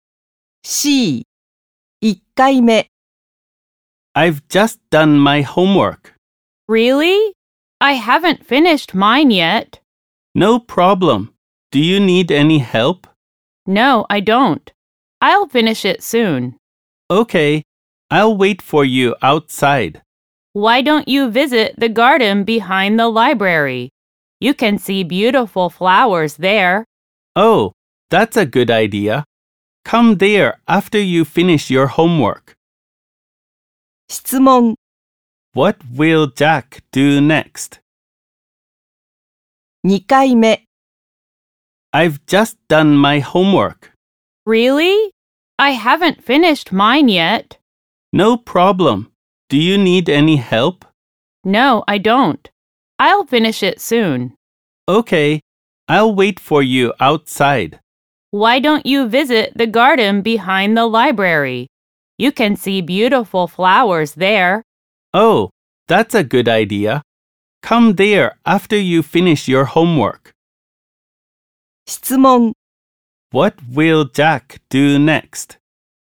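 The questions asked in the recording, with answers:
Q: What will Jack do next?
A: Visit the garden behind the library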